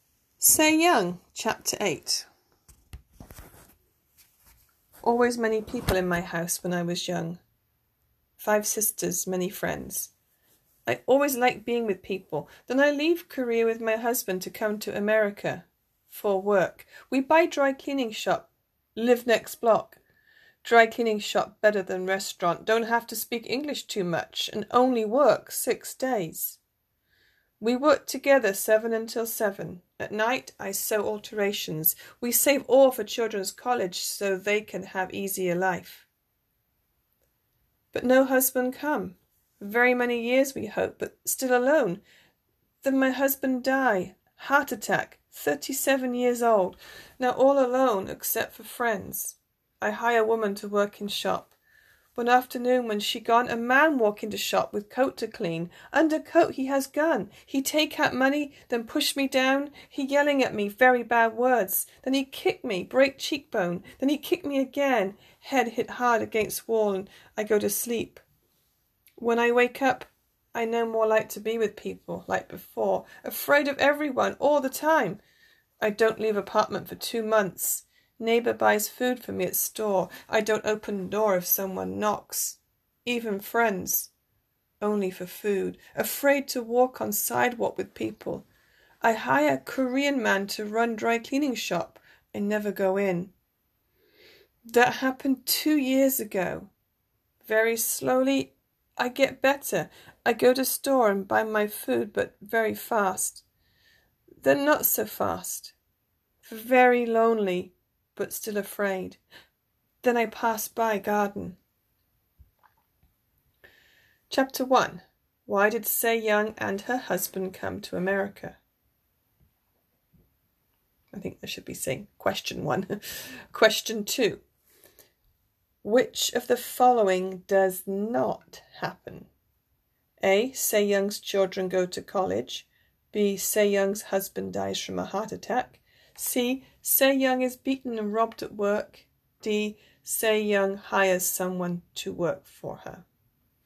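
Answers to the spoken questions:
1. For work
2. A: Sae Young's children go to college.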